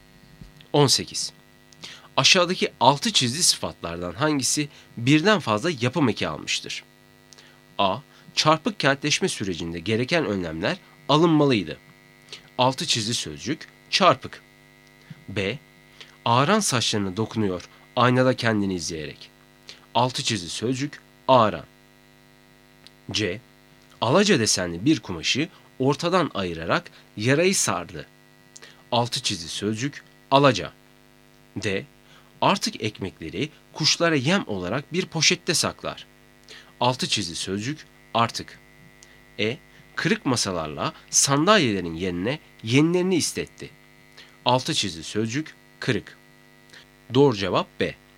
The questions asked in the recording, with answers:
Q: Aşağıdaki altı çizgi sıfatlardan hangisi birden fazla yapım eki almıştır?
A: Doğru cevap B.